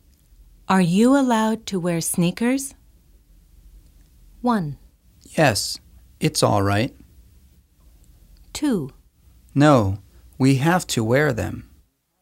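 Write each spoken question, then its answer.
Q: Are you allowed to wear sneakers?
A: 1: Yes, it's all right.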